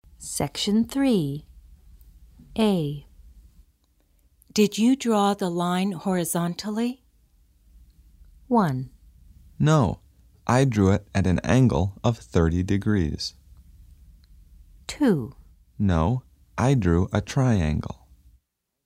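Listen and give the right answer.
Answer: 1: No, I drew it at an angle of 30 degrees.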